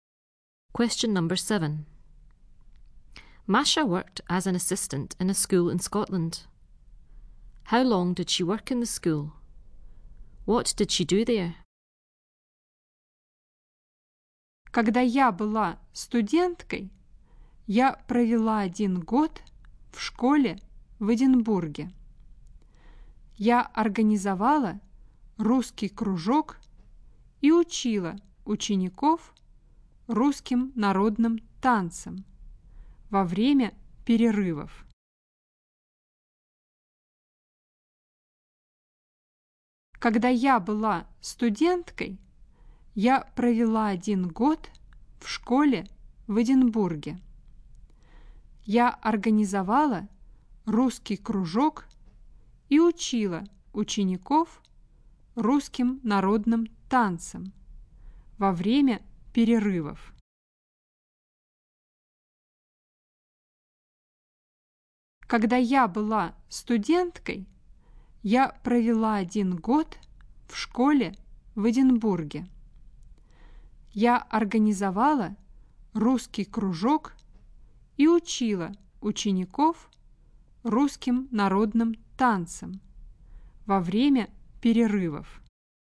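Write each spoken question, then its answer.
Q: How long did she work in the school?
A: One year

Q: What did she do there?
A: She organised a Russian club and taught pupils Russian folk dances at break times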